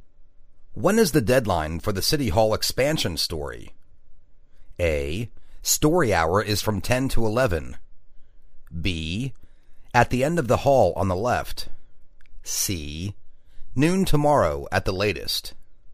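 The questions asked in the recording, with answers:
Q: When is the deadline for the City Hall expansion story?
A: C: Noon tomorrow at the latest.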